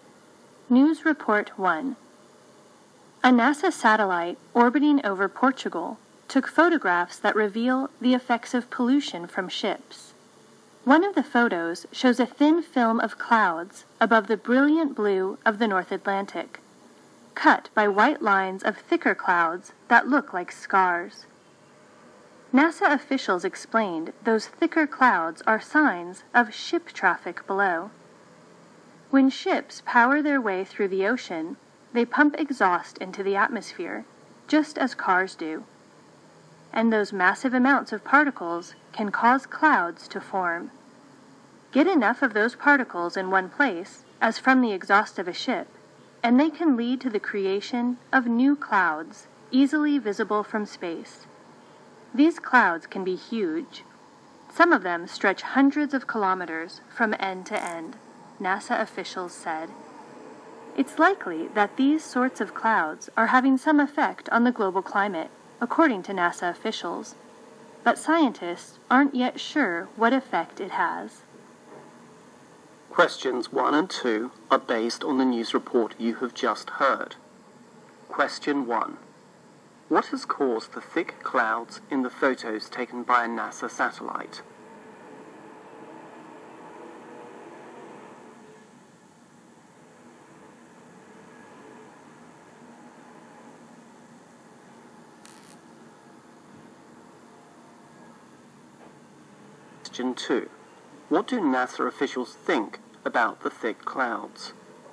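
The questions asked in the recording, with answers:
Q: What has caused the thick clouds in the photos taken by a NASA satellite?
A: Exhaust pollution from ships

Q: What do NASA officials think about the thick clouds?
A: They likely have some effect on the global climate, but scientists aren't sure what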